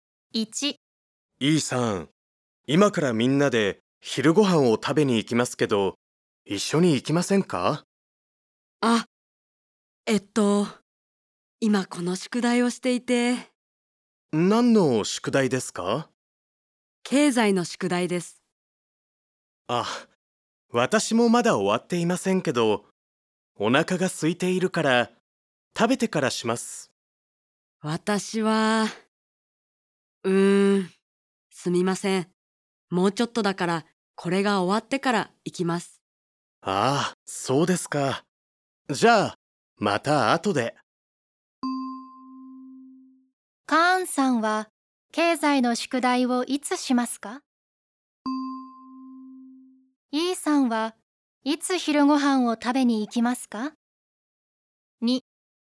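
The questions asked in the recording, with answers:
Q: カーンさんは、経済の宿題をいつしますか?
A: 昼ご飯を食べてからします

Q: Eさんは、いつ昼ご飯を食べに行きますか?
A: 宿題が終わってから行きます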